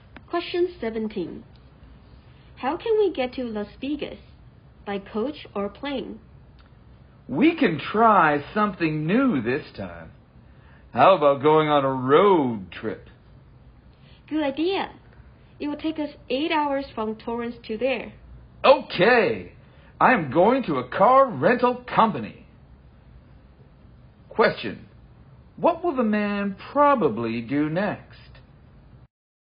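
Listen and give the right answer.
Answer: Rent a car at a car rental company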